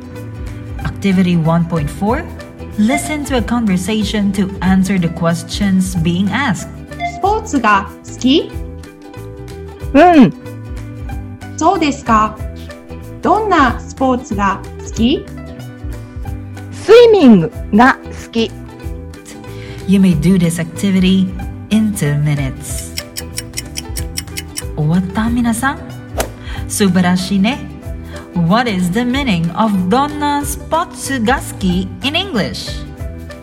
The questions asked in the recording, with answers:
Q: what is the meaning of Donna Spotsugaski in English?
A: It means what kind of sports do you like or which sports do you like?